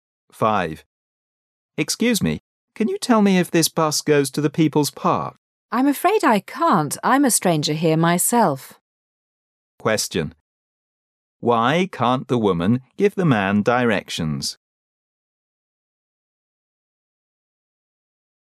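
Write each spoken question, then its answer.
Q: Why can't the woman give the man directions?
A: She is a stranger there herself

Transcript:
[解析] M: Excuse me, can you tell me if this bus goes to the People's park? W: I'm afraid I can't. I'm a stranger here myself. Q: Why can't the woman give the man directions?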